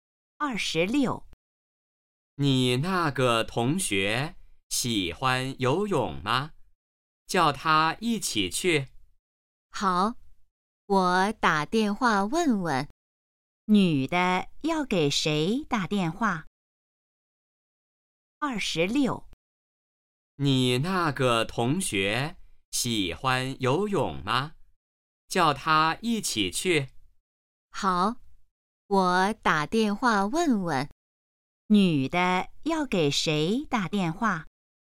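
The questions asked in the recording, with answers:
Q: 女的要给谁打电话?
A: 同学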